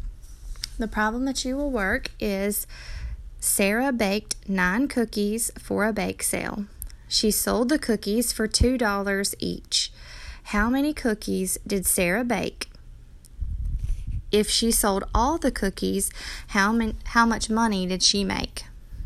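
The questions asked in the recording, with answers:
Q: How many cookies did Sarah bake?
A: 9 cookies

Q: If she sold all the cookies, how much money did she make?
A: $18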